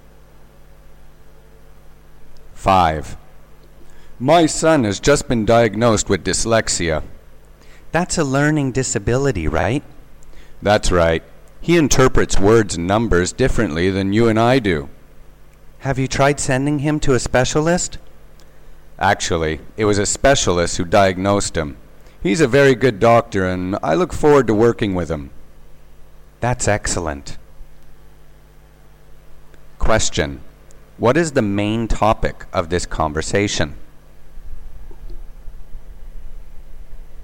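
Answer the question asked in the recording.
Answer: The speaker's son's dyslexia diagnosis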